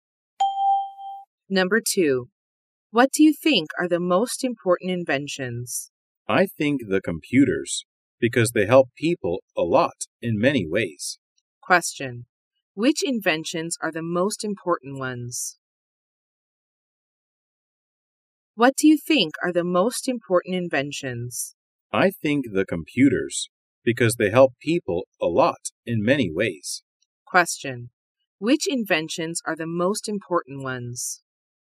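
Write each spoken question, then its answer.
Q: Which inventions are the most important ones?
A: Computers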